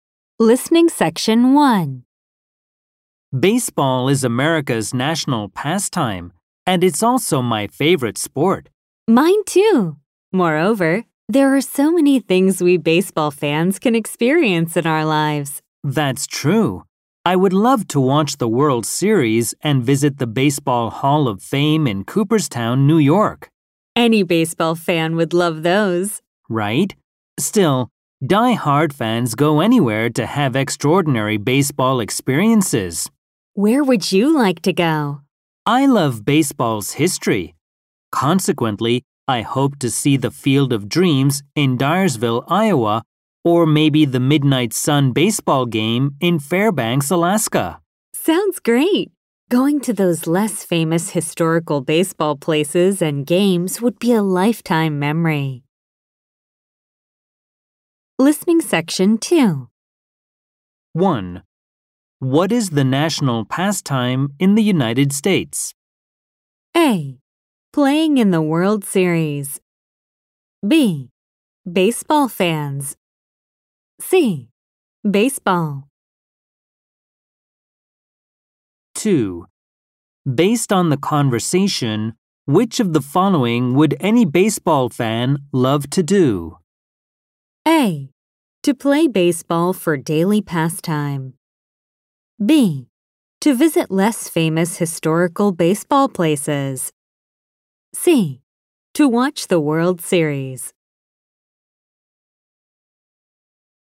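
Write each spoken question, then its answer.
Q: What is the national pastime in the United States?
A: C: Baseball.

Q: Based on the conversation, which of the following would any baseball fan love to do?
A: C: To watch the World Series.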